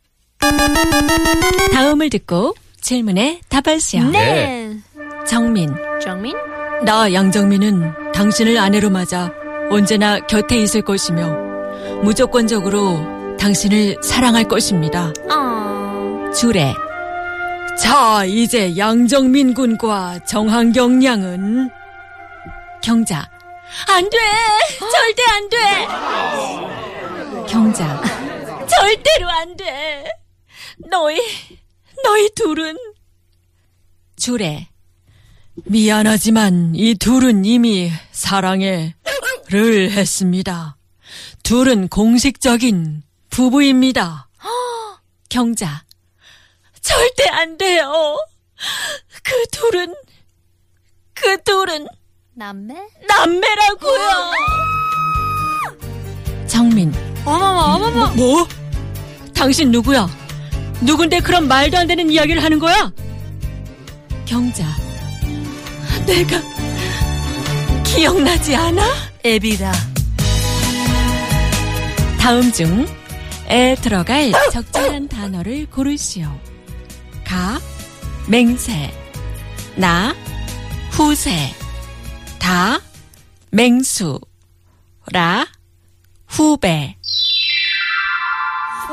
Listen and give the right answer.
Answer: The correct answer is?